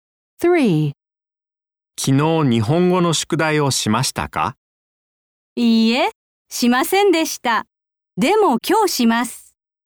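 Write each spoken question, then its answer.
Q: 昨日日本語の宿題をしましたか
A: いいえ、しませんでした(今日します)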